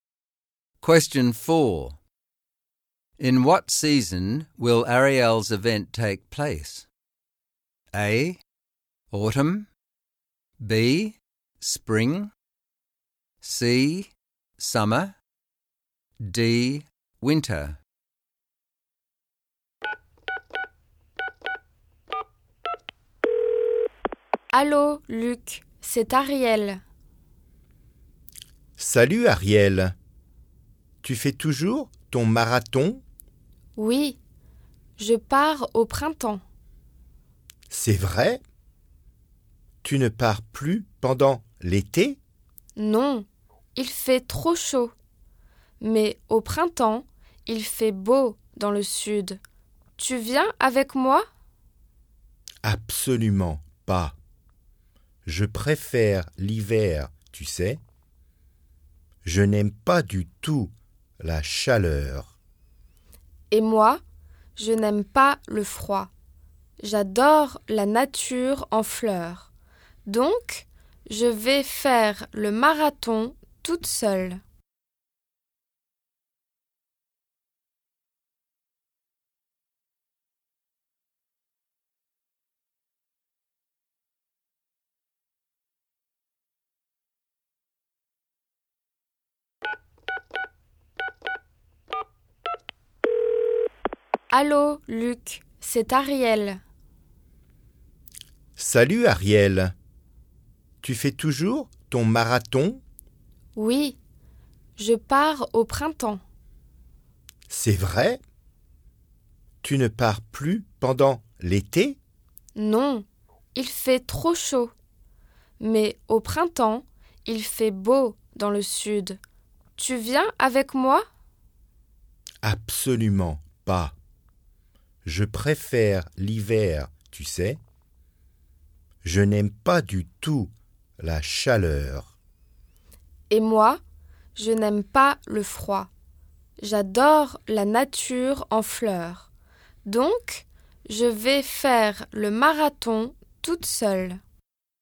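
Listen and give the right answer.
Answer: B: Spring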